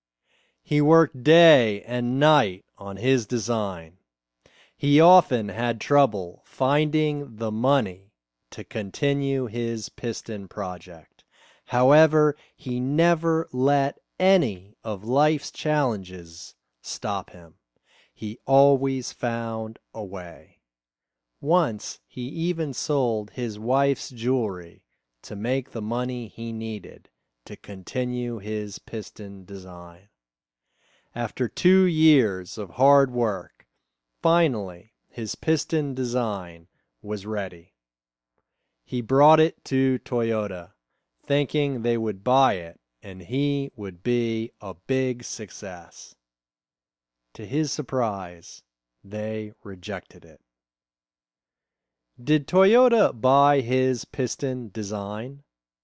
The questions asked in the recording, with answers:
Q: Did Toyota buy his piston design?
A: No, they didn't buy it. They rejected it.